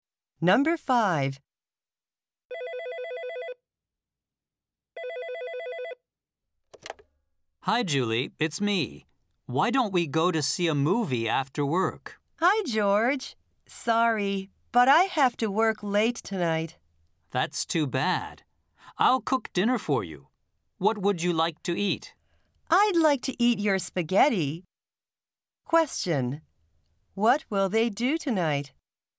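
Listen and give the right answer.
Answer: Eat spaghetti that George cooks for dinner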